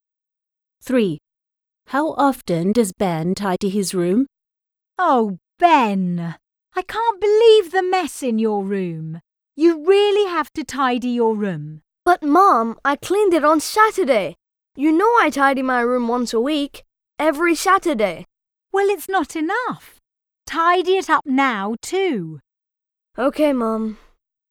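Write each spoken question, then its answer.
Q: How often does Ben tidy his room?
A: Once a week, every Saturday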